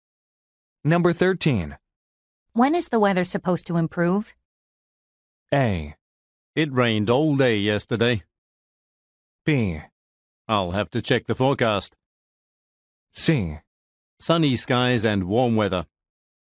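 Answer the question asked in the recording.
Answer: B: I'll have to check the forecast.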